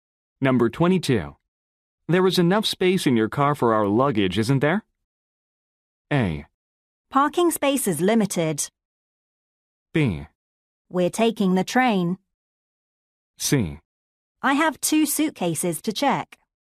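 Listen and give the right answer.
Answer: B: We're taking the train.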